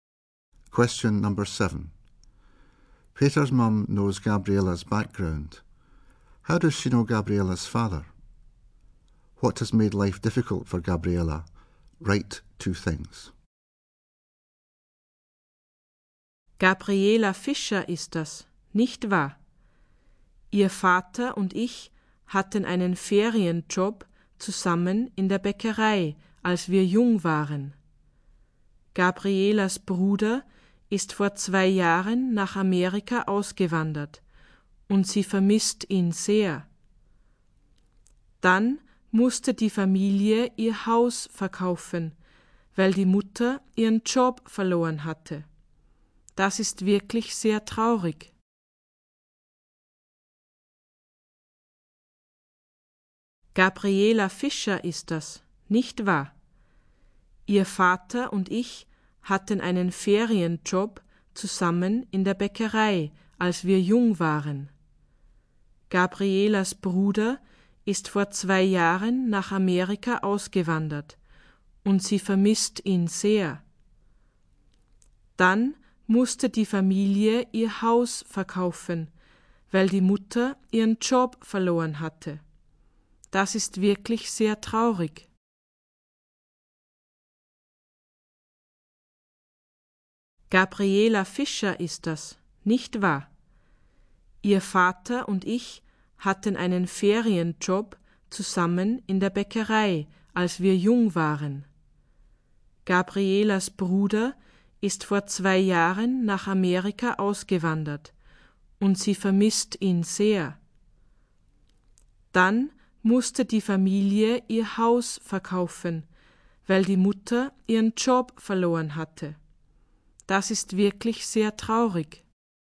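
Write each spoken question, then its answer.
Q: How does she know Gabriella's father?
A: They had a holiday job together in a bakery when young

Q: What has made life difficult for Gabriella?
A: Her brother emigrated to America and she misses him; family had to sell house because mother lost her job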